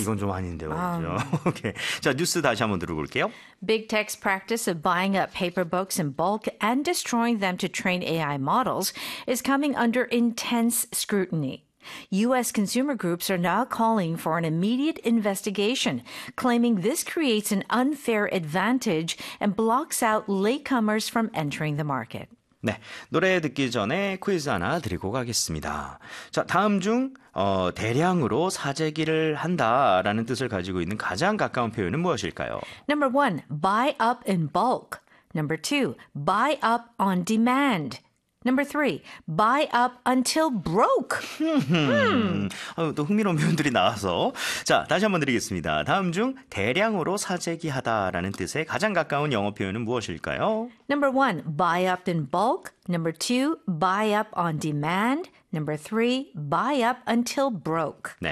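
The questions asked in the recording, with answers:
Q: 다음 중 대량으로 사재기하다라는 뜻에 가장 가까운 영어 표현은 무엇일까요?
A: 1: buy up in bulk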